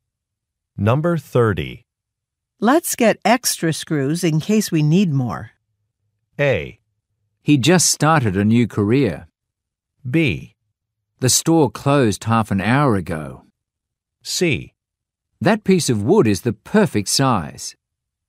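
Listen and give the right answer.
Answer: B: The store closed half an hour ago.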